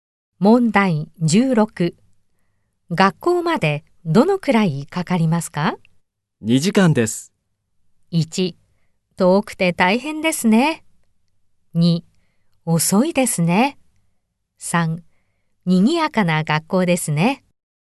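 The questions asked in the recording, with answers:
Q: 学校までどのくらいかかりますか?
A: 2: 遠くて大変ですね。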